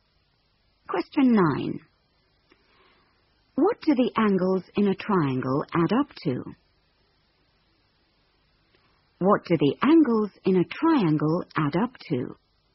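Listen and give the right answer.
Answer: 180 degrees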